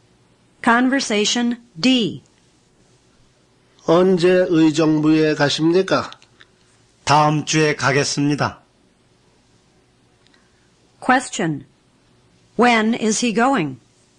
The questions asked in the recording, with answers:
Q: When is he going?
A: He's going next week.